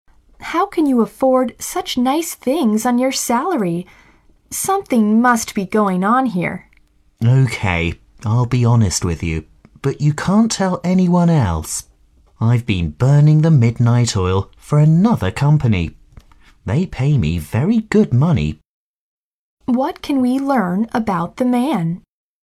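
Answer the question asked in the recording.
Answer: He secretly works a second job for another company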